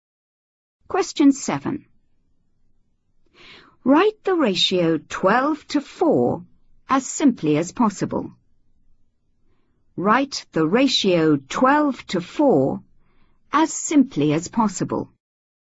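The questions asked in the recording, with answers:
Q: Write the ratio 12 to 4 as simply as possible.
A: 3:1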